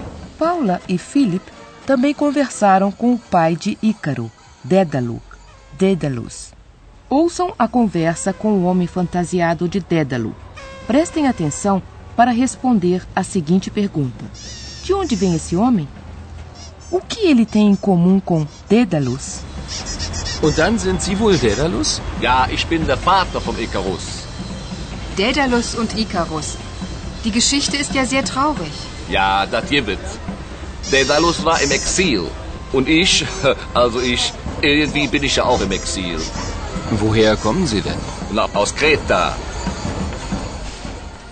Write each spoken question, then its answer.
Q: De onde vem esse homem?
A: É de lá que vem o homem.

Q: O que ele tem em comum com Dédalus?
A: Isso também acontece com um homem que se fantasiou de Dédalo.